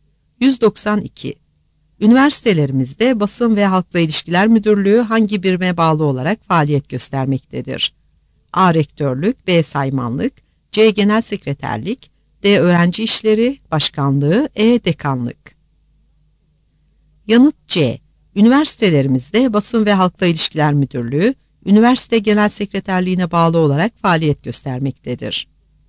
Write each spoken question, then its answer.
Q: Üniversitelerimizde Basın ve Halkla İlişkiler Müdürlüğü hangi birime bağlı olarak faaliyet göstermektedir?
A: Yanıt C.